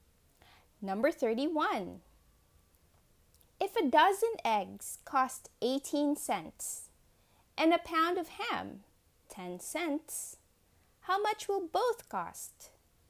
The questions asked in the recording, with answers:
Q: If a dozen eggs cost 18 cents and a pound of ham 10 cents, how much will both cost?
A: The answer is 28 cents.